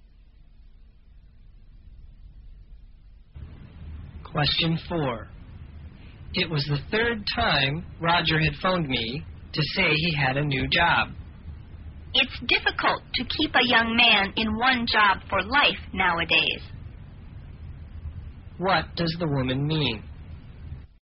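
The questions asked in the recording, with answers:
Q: What does the woman mean?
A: It's normal for young men like Roger to change jobs often.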